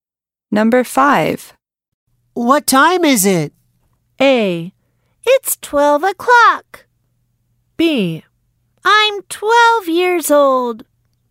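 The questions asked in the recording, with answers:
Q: What time is it?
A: A: It's 12 o'clock.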